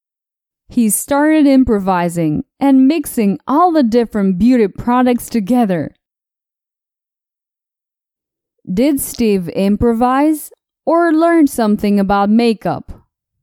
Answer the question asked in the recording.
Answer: No. Steve didn't learn anything about makeup.